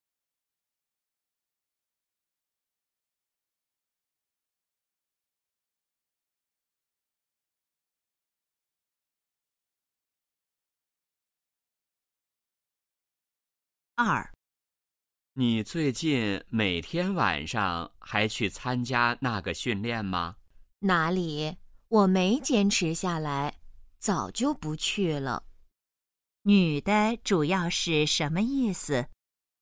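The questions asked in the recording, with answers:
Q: 女的主要是什么意思?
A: 她早就不去参加训练了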